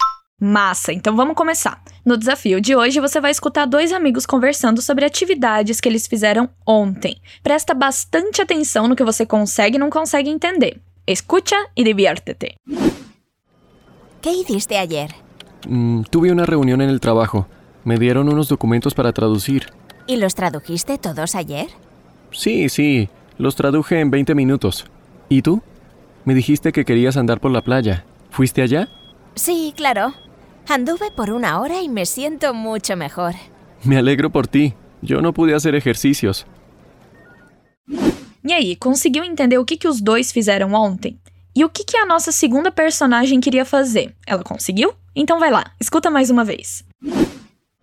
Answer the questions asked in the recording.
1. um deles teve uma reunião e precisou traduzir uns documentos
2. Andar por la playa.
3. Que sim, claro.